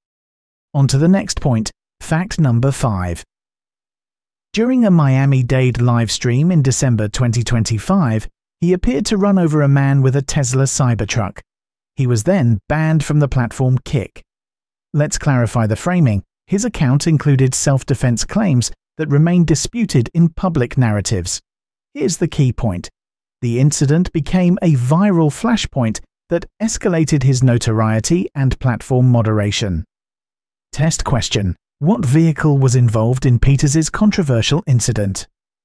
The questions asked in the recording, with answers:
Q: What vehicle was involved in Peters's controversial incident?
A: Correct answer. Tesla Cybertruck.